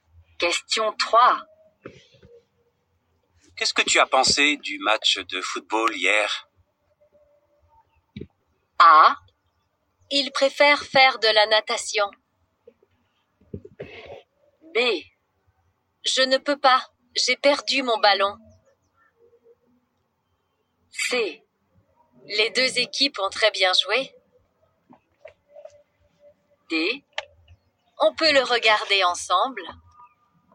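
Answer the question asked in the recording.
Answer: C: Les deux équipes ont très bien joué.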